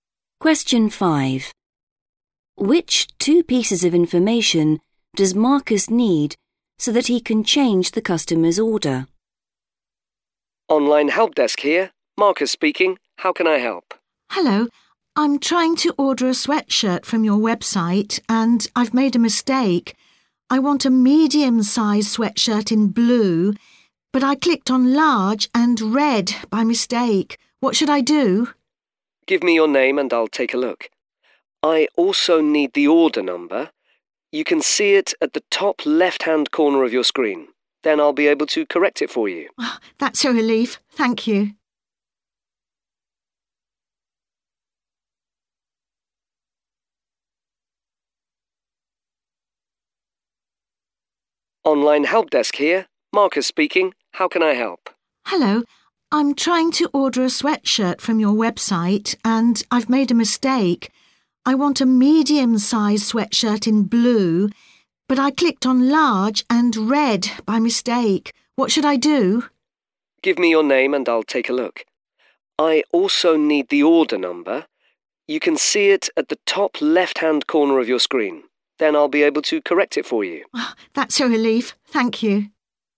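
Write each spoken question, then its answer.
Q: Which two pieces of information does Marcus need so that he can change the customer's order?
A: Her name and the order number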